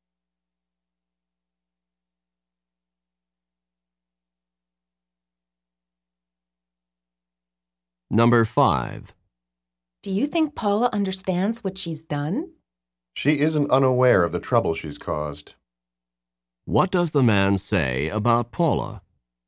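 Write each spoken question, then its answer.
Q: What does the man say about Paula?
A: She is aware of the trouble she caused.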